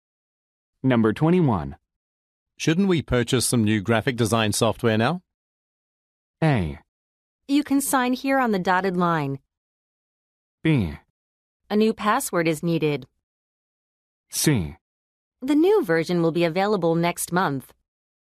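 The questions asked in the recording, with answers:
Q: Shouldn't we purchase some new graphic design software now?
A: C: The new version will be available next month.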